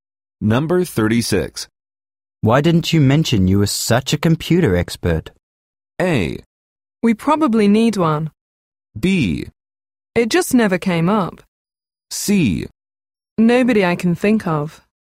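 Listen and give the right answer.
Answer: B: It just never came up.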